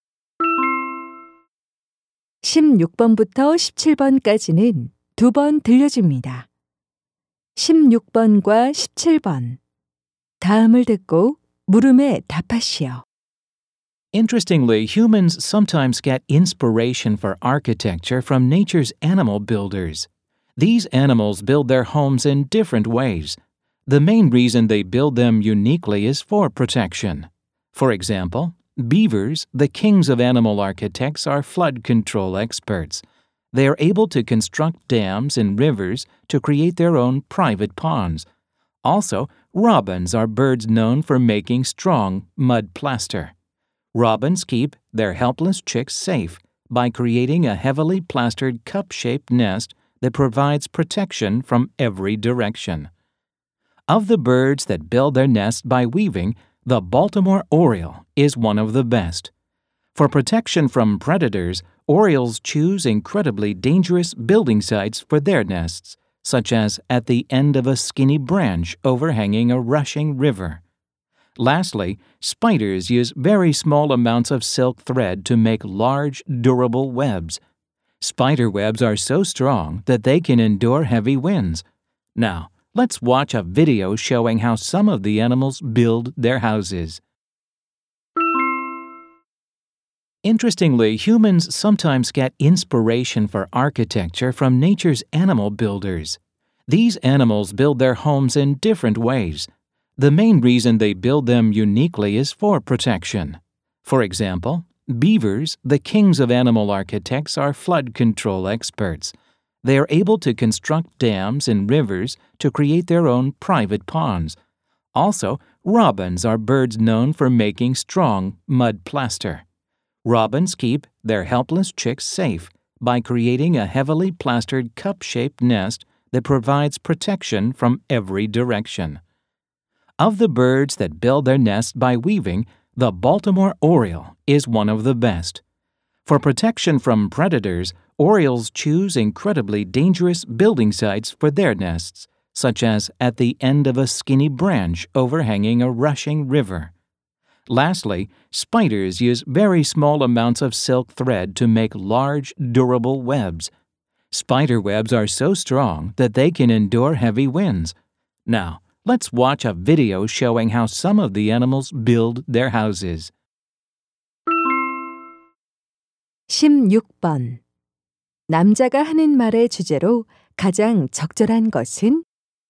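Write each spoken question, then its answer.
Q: 남자가 하는 말의 주제로 가장 적절한 것은?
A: 동물들이 보호를 위해 집을 짓는 독특한 방법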